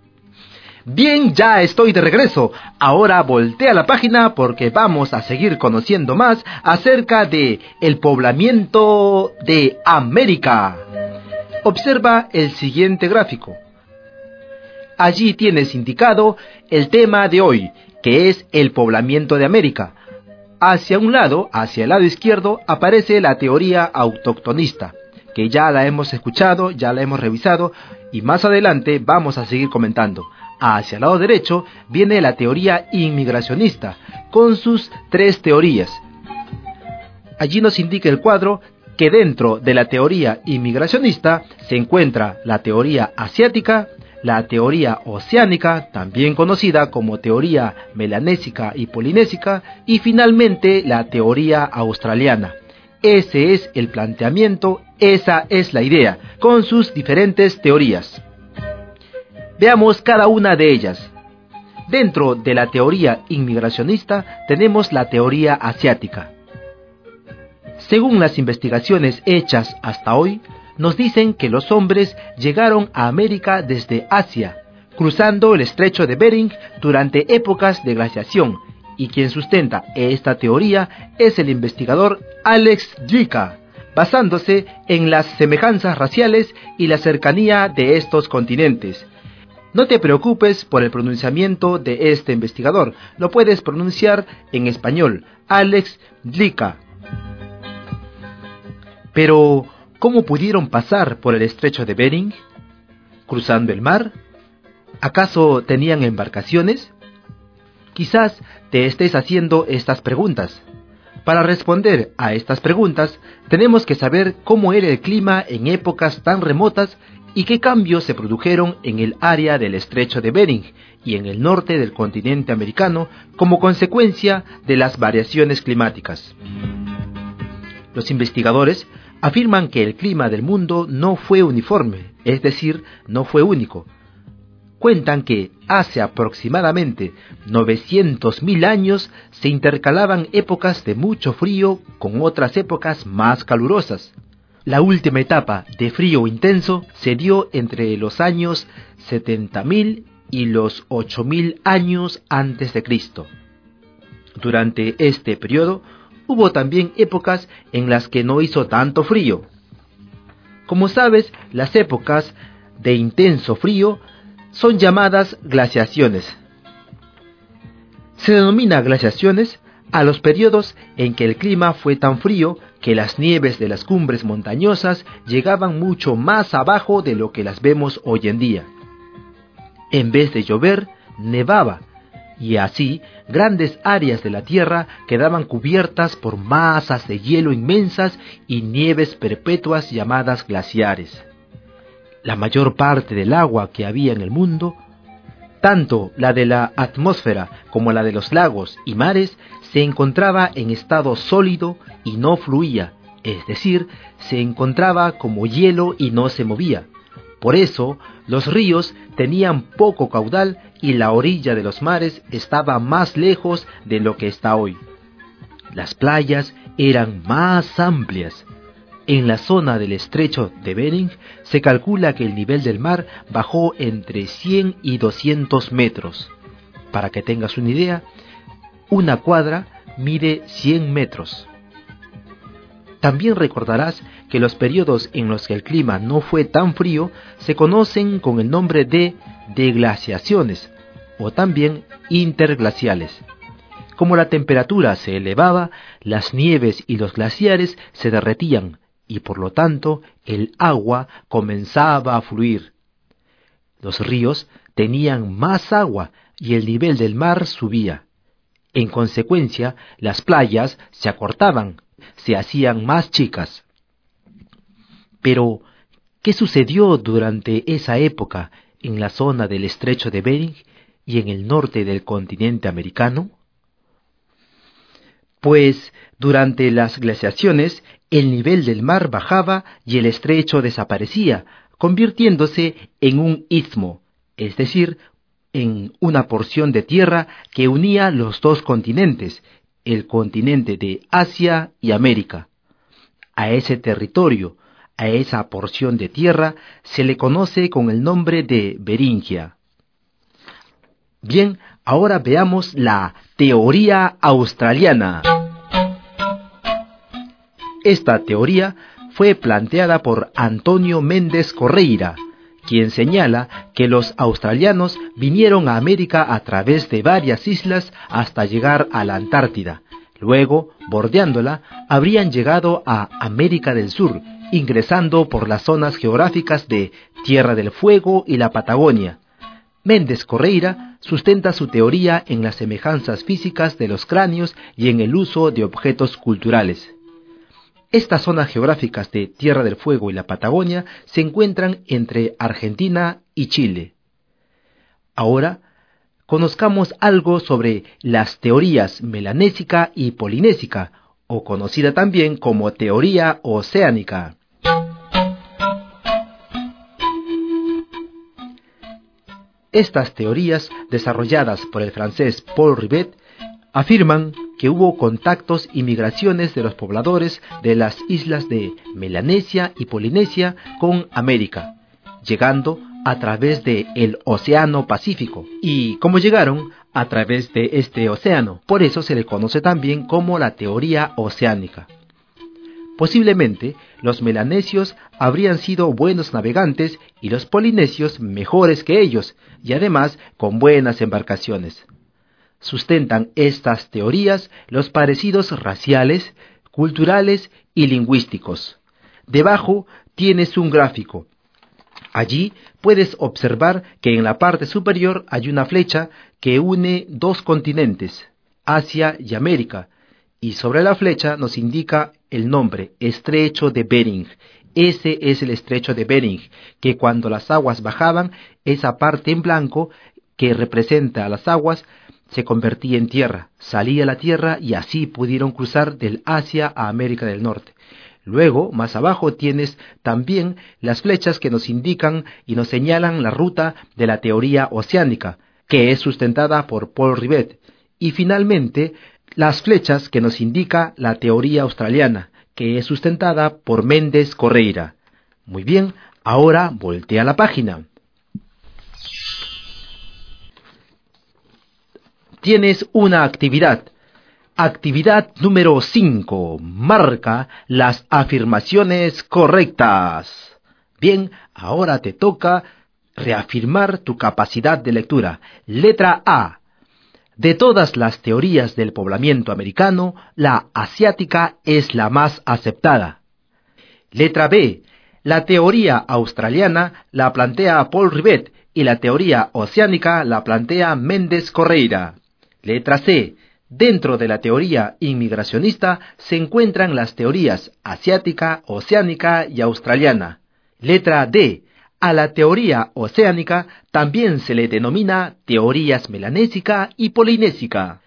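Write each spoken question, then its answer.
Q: Letra B. La teoría australiana la plantea Paul Rivet y la teoría oceánica la plantea Méndez Correira.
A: Incorrecta (es al revés)

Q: Letra C. Dentro de la teoría inmigracionista se encuentran las teorías asiática, oceánica y australiana.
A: Correcta

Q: Letra D. A la teoría oceánica también se le denomina teorías melanésica y polinésica.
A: Correcta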